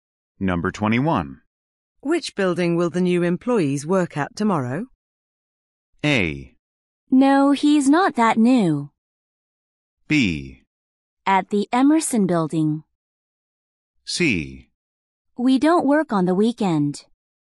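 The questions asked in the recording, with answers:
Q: Which building will the new employees work at tomorrow?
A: B: At the Emerson Building.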